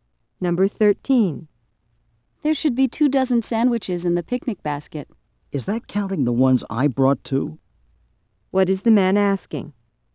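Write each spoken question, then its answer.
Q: What is the man asking?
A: Whether the two dozen includes the sandwiches he brought.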